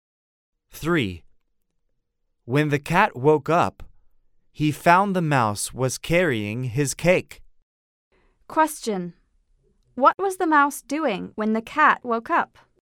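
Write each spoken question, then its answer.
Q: What was the mouse doing when the cat woke up?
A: He was carrying the cat's cake.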